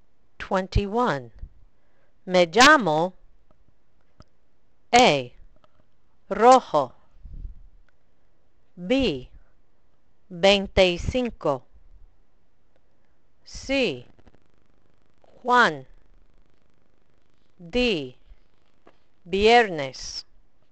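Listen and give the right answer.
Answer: C: Juan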